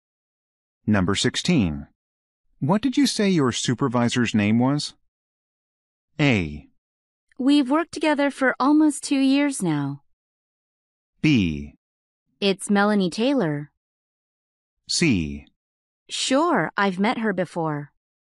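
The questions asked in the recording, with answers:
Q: What did you say your supervisor's name was?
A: B: It's Melanie Taylor.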